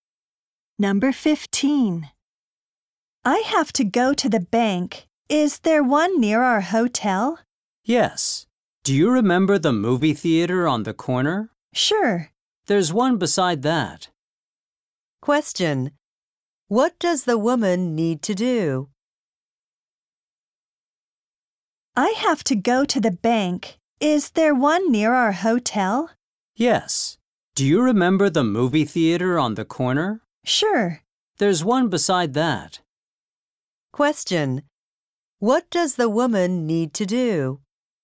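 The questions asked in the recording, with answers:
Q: What does the woman need to do?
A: Go to the bank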